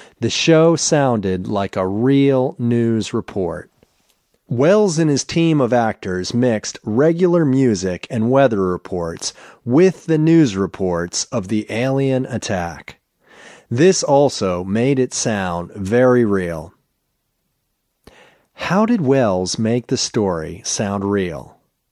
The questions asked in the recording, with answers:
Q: How did Welles make the story sound real?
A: They mixed regular music and weather reports with the news reports of the alien attack.